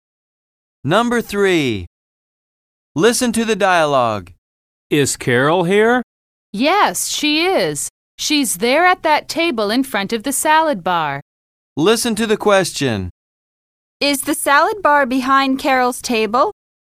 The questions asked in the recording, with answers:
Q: Is the salad bar behind Carol's table?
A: Yes, it is.